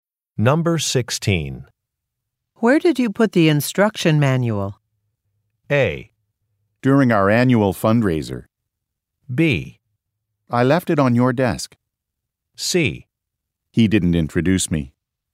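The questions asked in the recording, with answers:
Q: Where did you put the instruction manual?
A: B: I left it on your desk.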